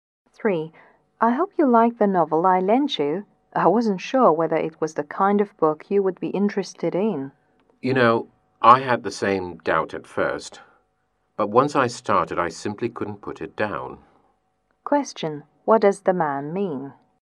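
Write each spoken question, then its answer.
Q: What does the man mean?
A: He enjoyed the novel very much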